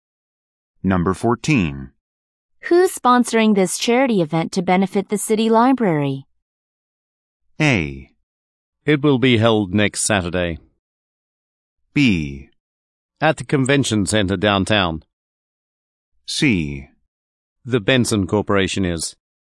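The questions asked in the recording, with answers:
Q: Who's sponsoring this charity event to benefit the city library?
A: C: The Benson Corporation is.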